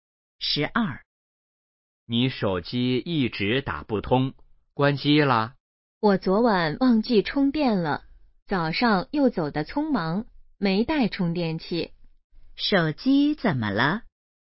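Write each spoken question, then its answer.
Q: 手机怎么了?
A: 没电了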